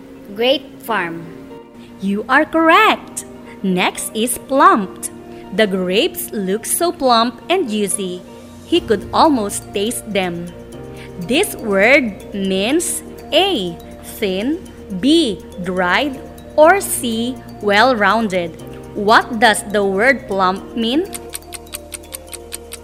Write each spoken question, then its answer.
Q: What does the word plump mean?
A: Ma'am, the word plump means see, well rounded.